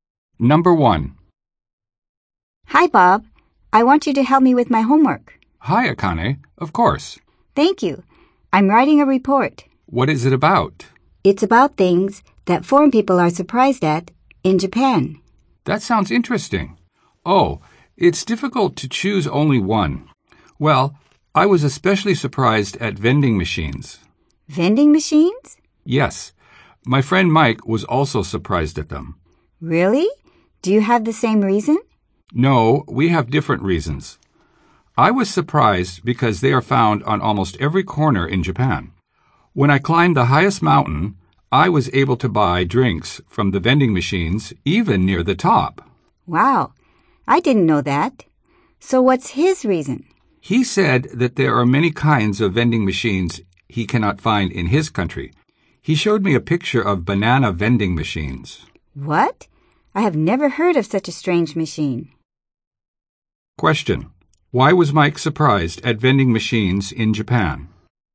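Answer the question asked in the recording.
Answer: Because there are many kinds of vending machines he cannot find in his country.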